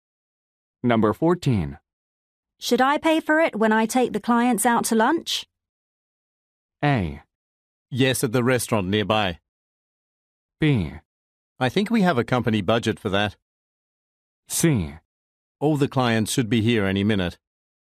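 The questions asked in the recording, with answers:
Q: Should I pay for it when I take the clients out to lunch?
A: B: I think we have a company budget for that.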